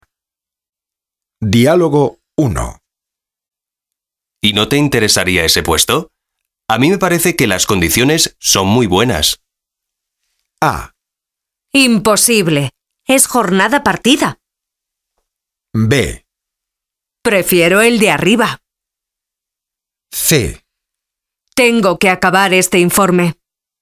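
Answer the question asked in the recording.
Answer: A: Imposible. Es jornada partida.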